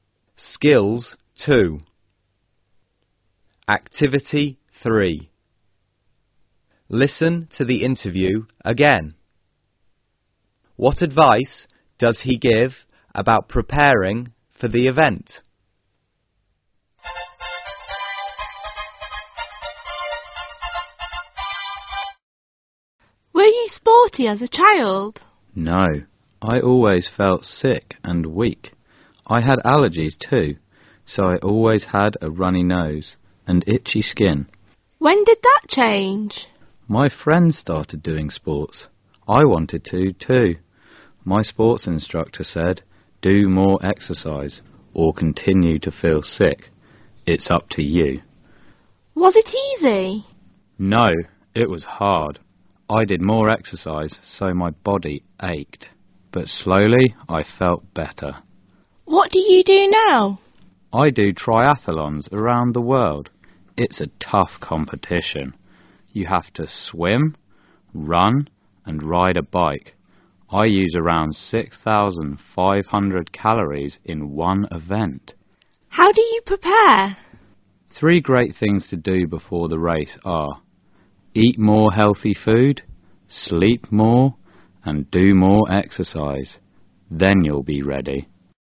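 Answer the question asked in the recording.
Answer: Eat more healthy food, sleep more, and do more exercise.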